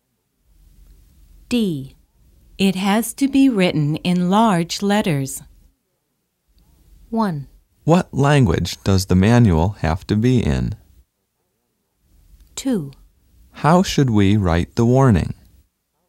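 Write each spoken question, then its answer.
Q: It has to be written in large letters.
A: 2: How should we write the warning?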